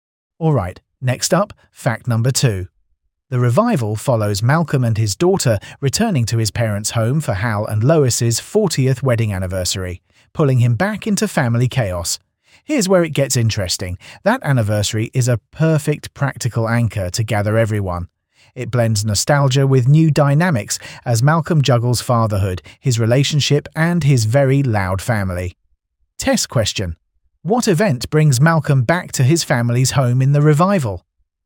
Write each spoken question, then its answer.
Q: What event brings Malcolm back to his family's home in the revival?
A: Correct answer. Hal and Lois's 40th wedding anniversary.